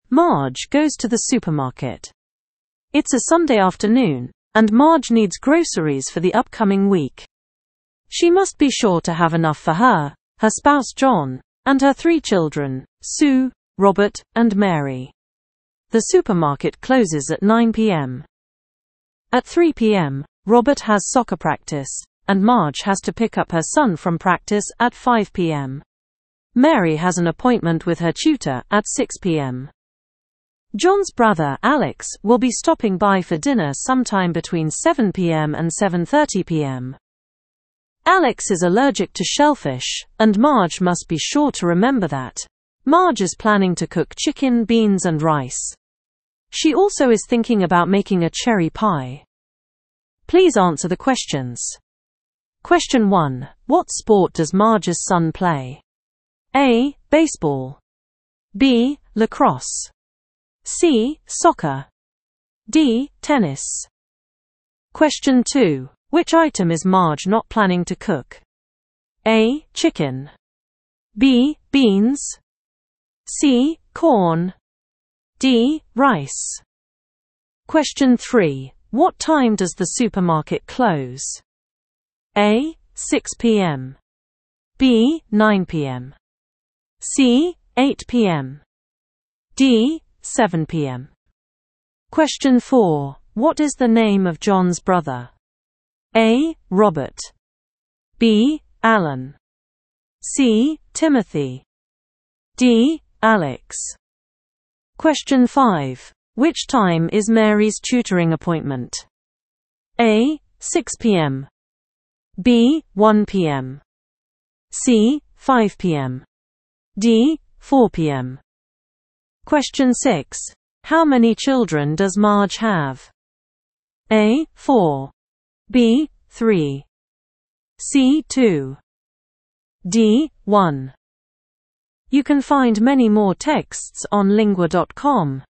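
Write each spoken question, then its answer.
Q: What sport does Marge's son play?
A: C: Soccer.

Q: Which item is Marge not planning to cook?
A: C: Corn.

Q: What time does the supermarket close?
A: B: 9 p.m.

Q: What is the name of John's brother?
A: D: Alex.

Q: Which time is Mary's tutoring appointment?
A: A: 6 p.m.

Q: How many children does Marge have?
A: B: 3.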